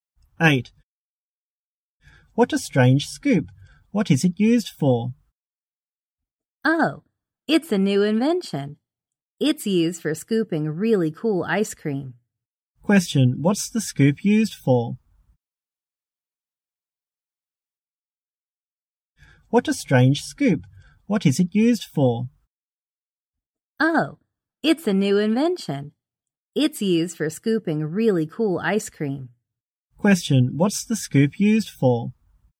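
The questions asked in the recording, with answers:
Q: What's the scoop used for?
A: Scooping really cool ice cream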